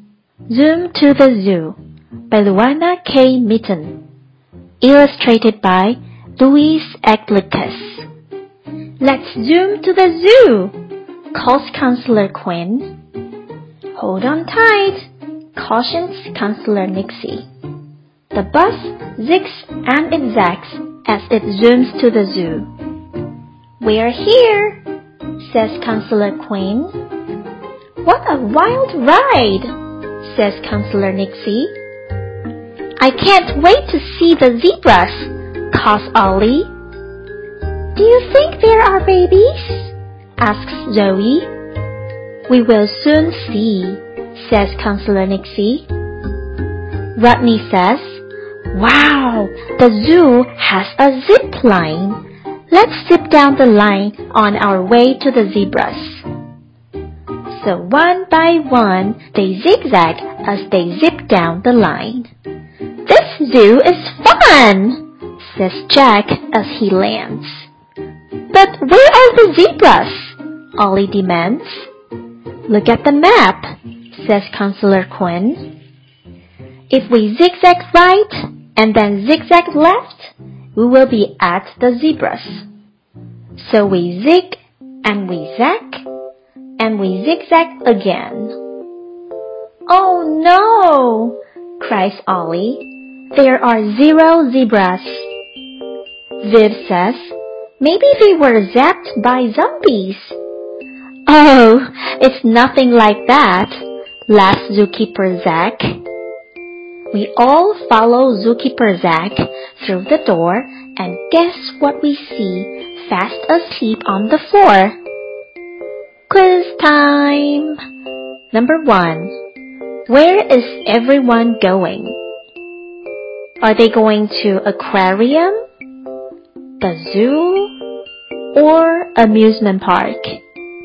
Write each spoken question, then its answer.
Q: Where is everyone going? Are they going to aquarium, the zoo, or amusement park?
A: The answer is the zoo.